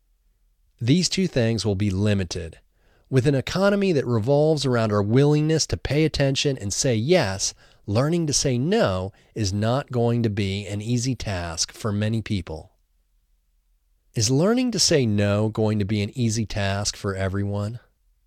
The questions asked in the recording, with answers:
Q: Is learning to say no going to be an easy task for everyone?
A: No, learning to say no is not going to be an easy task for many people.